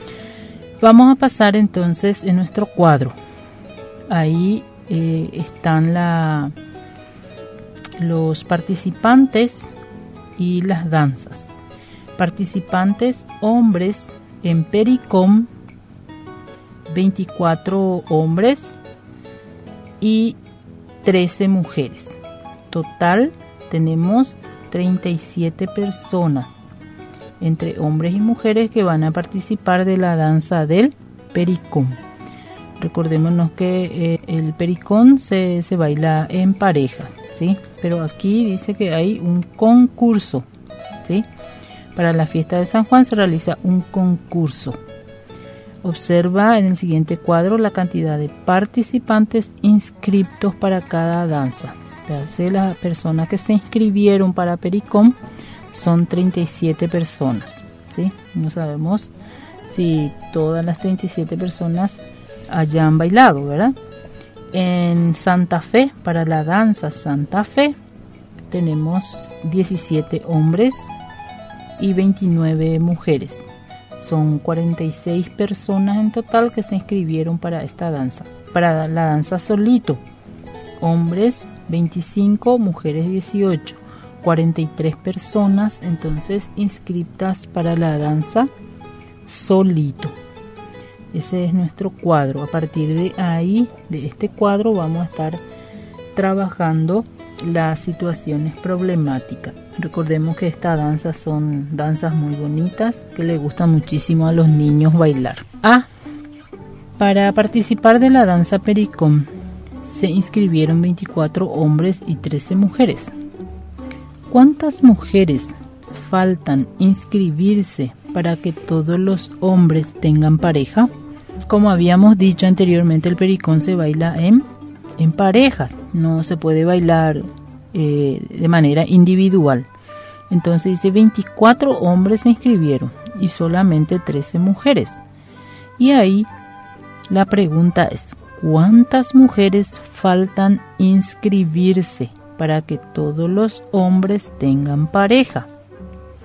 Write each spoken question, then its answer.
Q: ¿cuántas mujeres faltan inscribirse para que todos los hombres tengan pareja?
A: faltan inscribirse 11 mujeres para que todos los hombres tengan parejas.